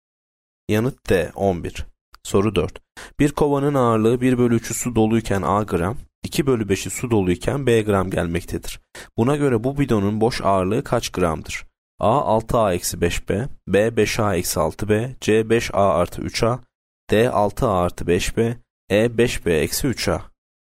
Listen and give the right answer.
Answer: Yanıt A 6A-5B.